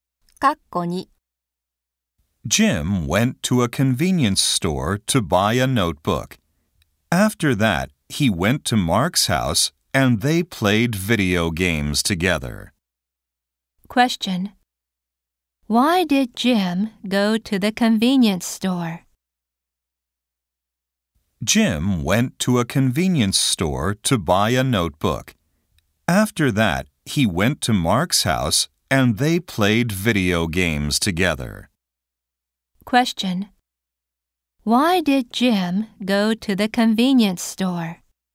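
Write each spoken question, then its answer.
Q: Why did Jim go to the convenience store?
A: To buy a notebook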